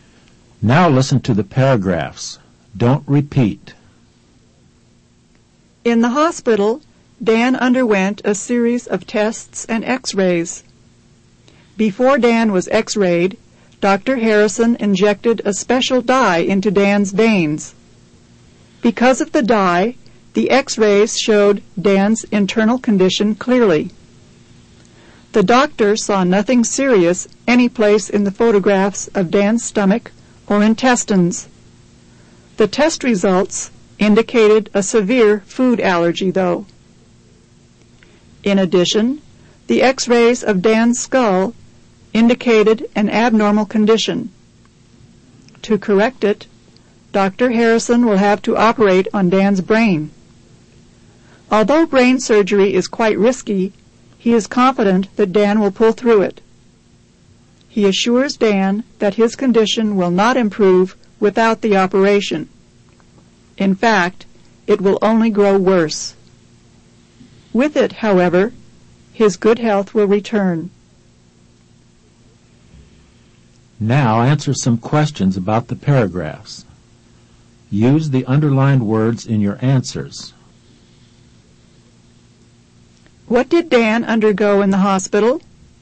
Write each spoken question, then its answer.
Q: What did Dan undergo in the hospital?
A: He underwent a series of tests and x-rays.